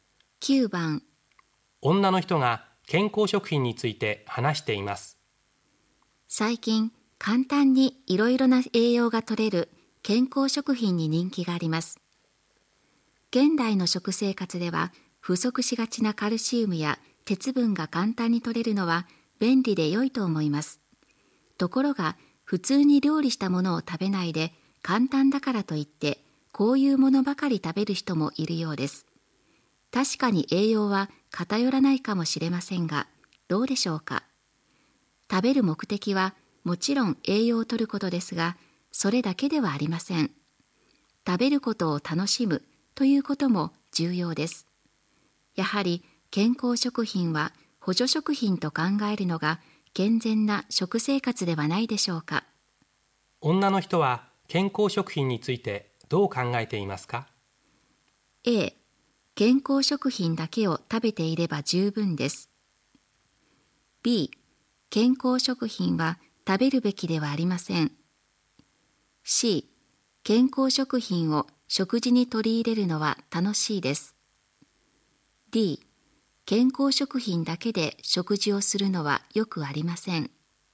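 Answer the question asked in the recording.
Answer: D: 健康食品だけで食事をするのはよくありません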